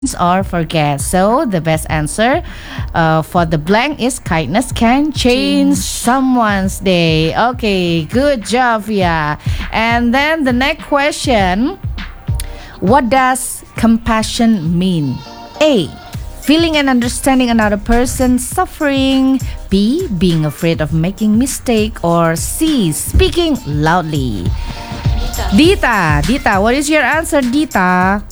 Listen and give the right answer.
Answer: Feeling and understanding another person, right?